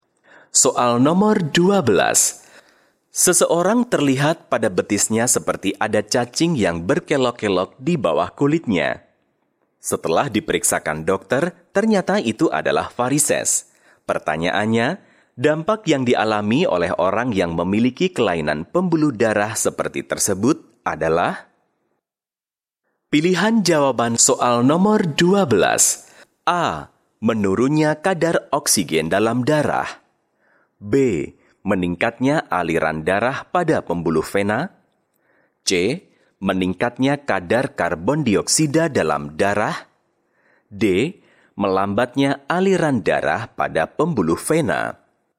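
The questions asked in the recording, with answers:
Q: Pertanyaannya, dampak yang dialami oleh orang yang memiliki kelainan pembuluh darah seperti tersebut adalah?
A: D: Melambatnya aliran darah pada pembuluh vena.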